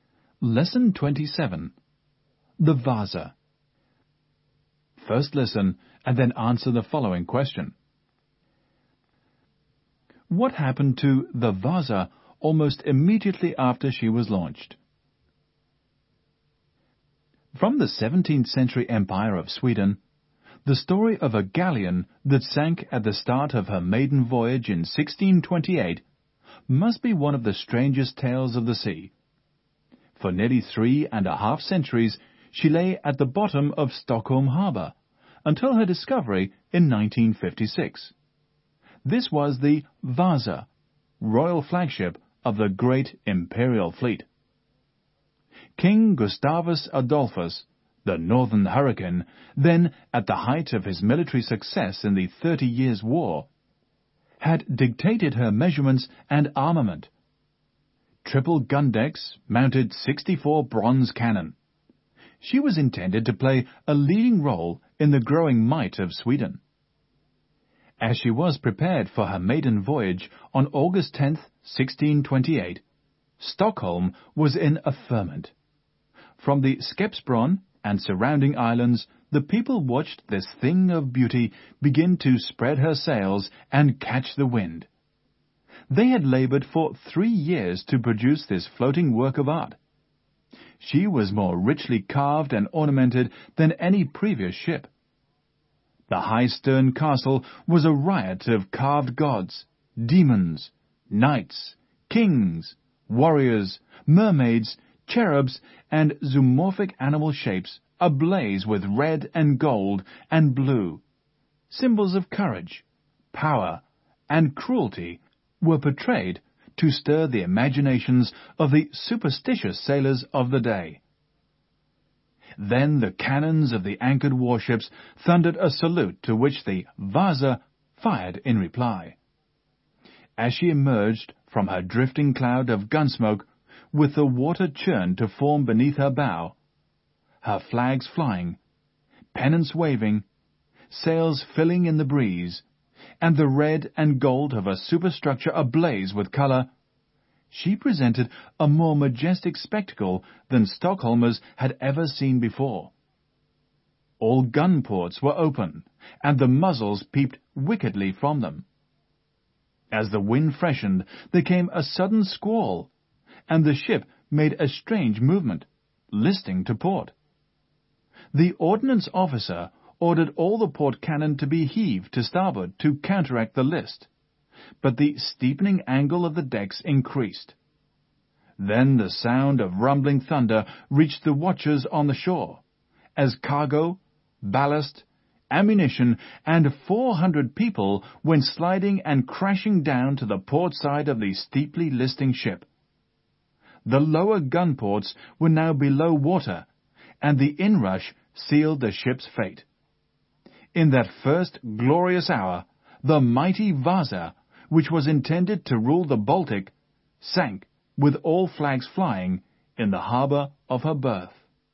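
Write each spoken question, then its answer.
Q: What happened to the Vaza almost immediately after she was launched?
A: She listed to port in a sudden squall and sank in Stockholm harbour.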